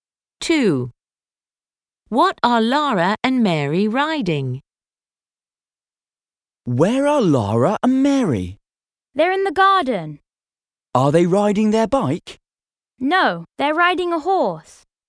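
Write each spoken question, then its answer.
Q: What are Lara and Mary riding?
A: A horse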